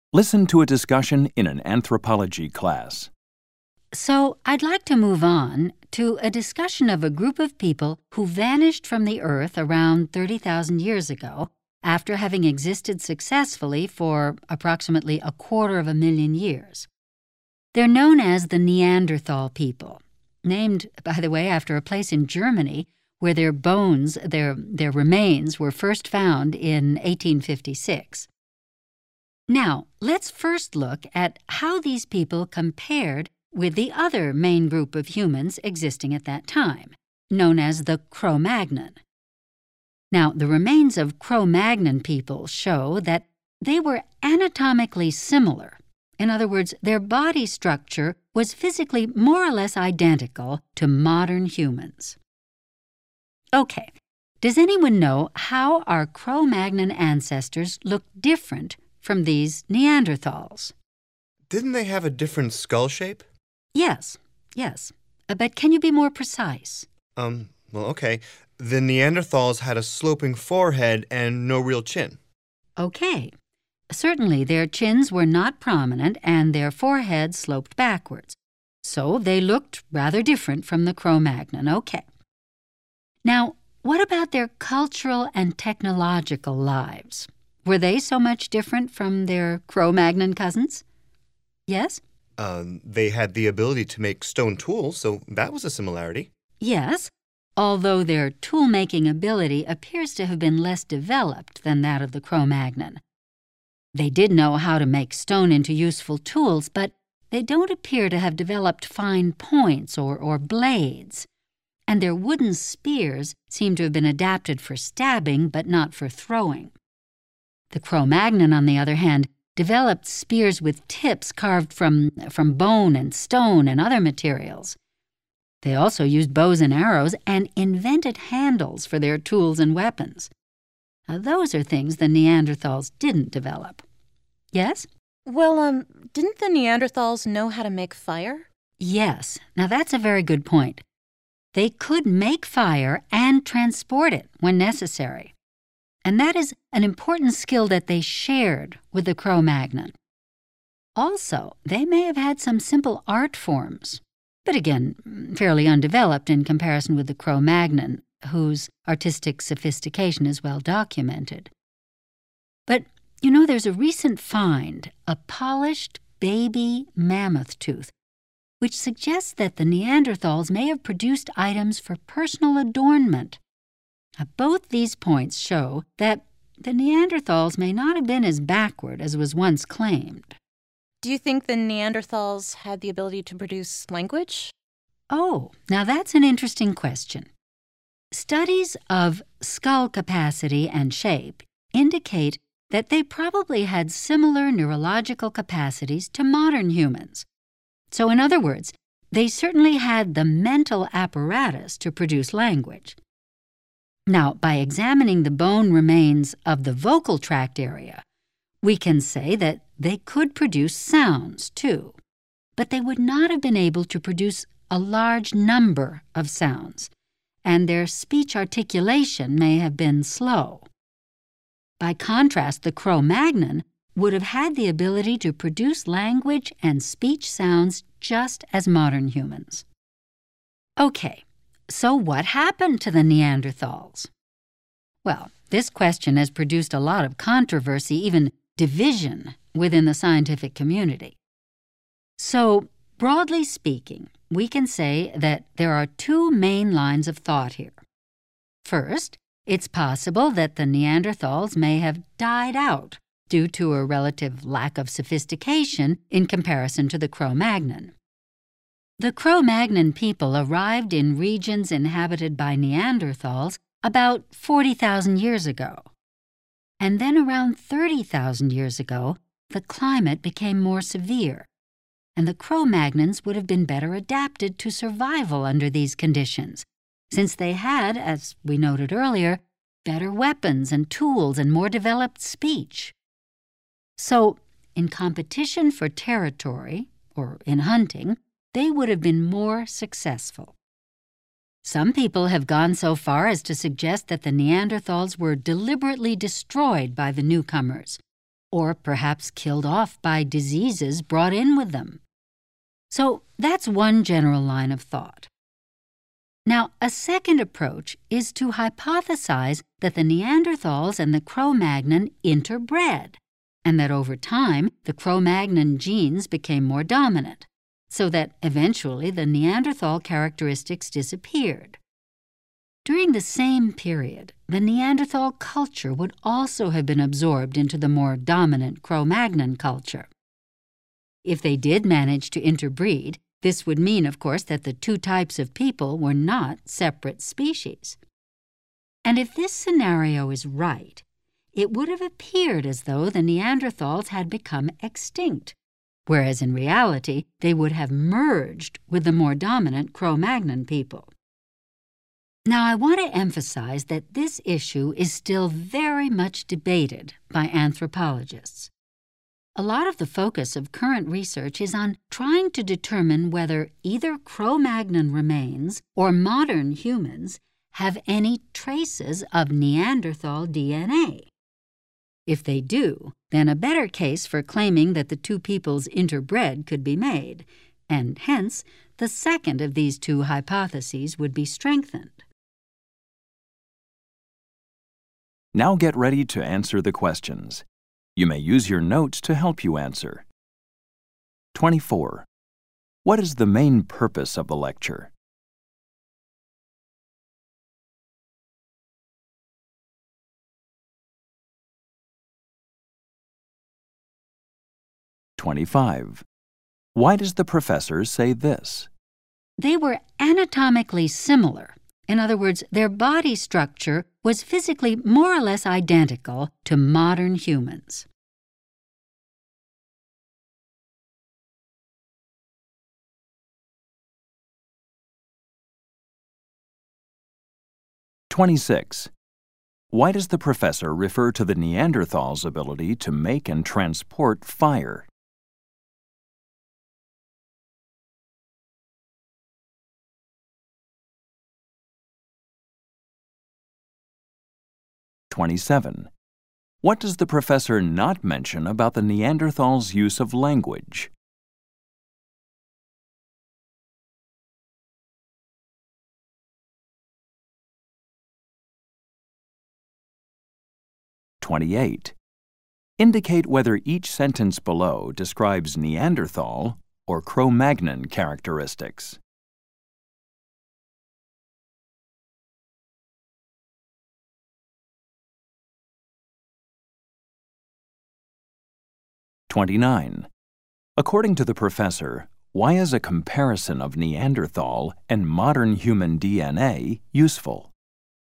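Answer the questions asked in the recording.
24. To compare Neanderthals with Cro-Magnon people and discuss theories about why the Neanderthals disappeared
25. To explain what "anatomically similar" means
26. To point out an important skill they shared with the Cro-Magnon, showing they were not as backward as once claimed
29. It could show whether the two peoples interbred, which would strengthen the interbreeding hypothesis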